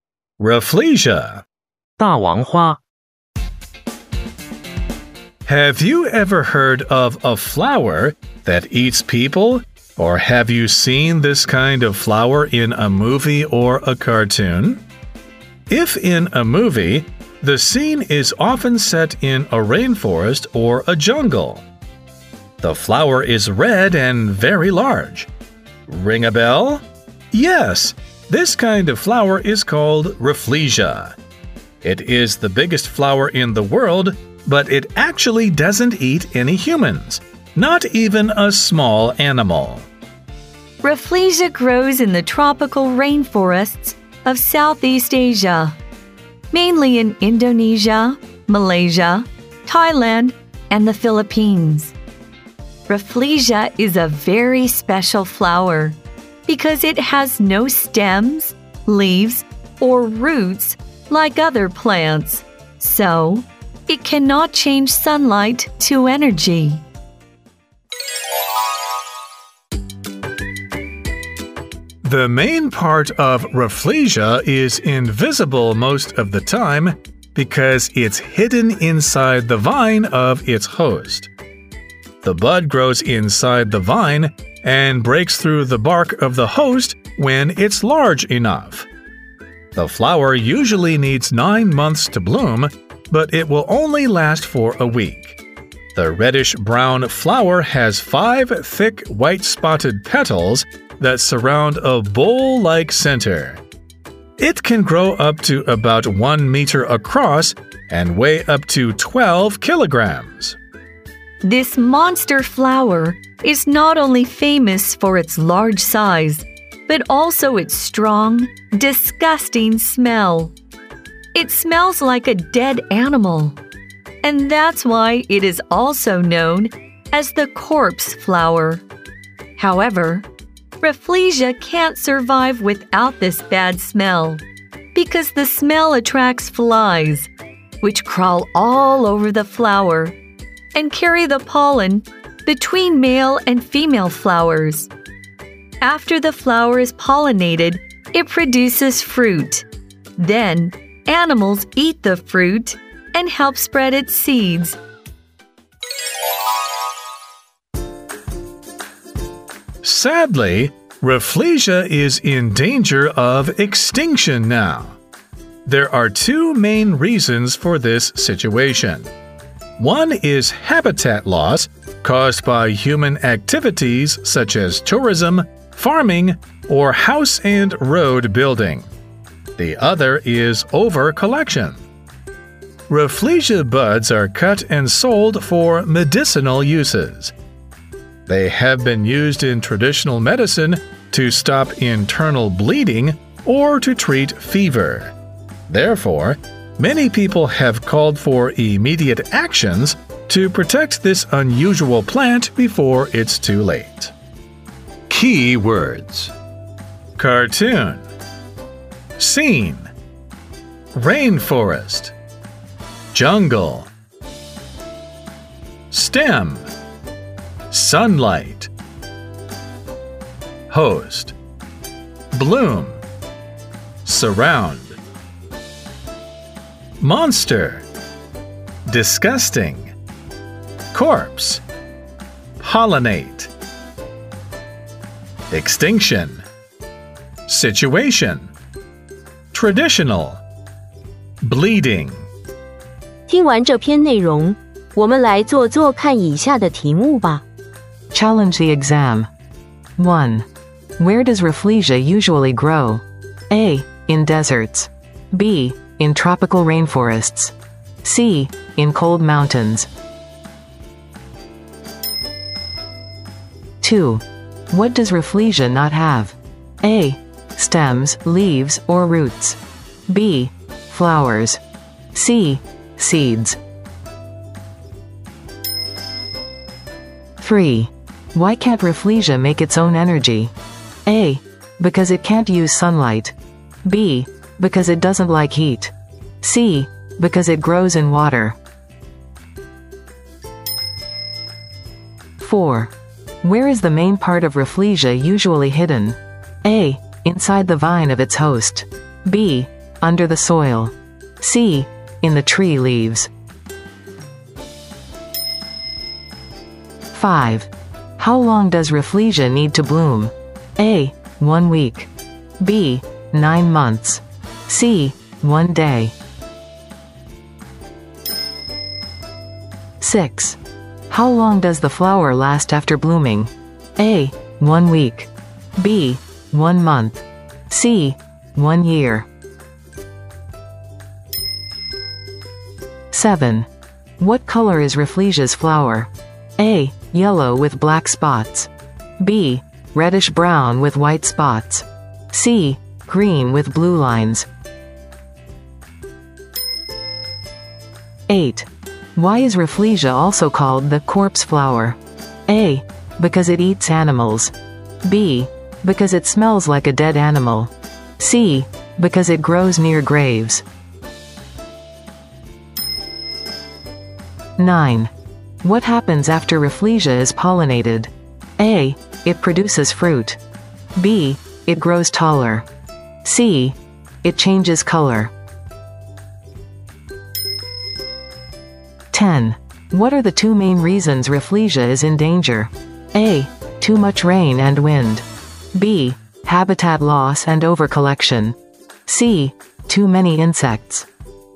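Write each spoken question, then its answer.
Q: Where does Rafflesia usually grow?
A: B: In tropical rainforests.

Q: What does Rafflesia not have?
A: A: Stems, leaves, or roots.

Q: Why can't Rafflesia make its own energy?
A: A: Because it can't use sunlight.

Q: Where is the main part of Rafflesia usually hidden?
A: A: Inside the vine of its host.

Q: How long does Rafflesia need to bloom?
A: B: 9 months.

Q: How long does the flower last after blooming?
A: A: 1 week.

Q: What color is Rafflesia's flower?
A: B: Reddish brown with white spots.

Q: Why is Rafflesia also called the corpse flower?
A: B: Because it smells like a dead animal.

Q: What happens after Rafflesia is pollinated?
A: A: It produces fruit.

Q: What are the two main reasons Rafflesia is in danger?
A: B: Habitat loss and overcollection.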